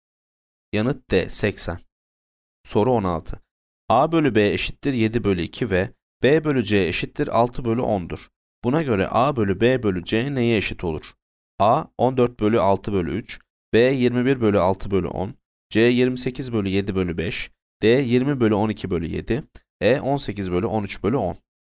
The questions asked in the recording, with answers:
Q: Buna göre A bölü B bölü C neye eşit olur?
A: Yanıt B 21 bölü 6 bölü 10.